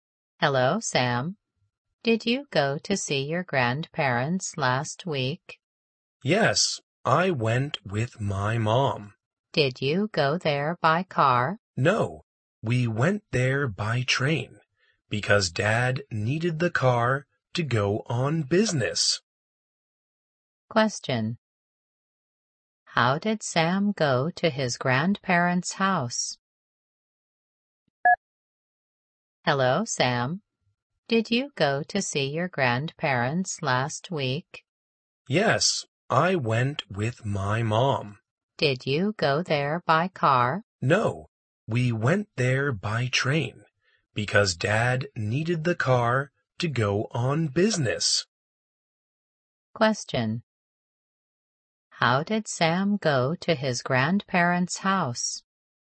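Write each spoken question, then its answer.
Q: How did Sam go to his grandparents' house?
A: By train.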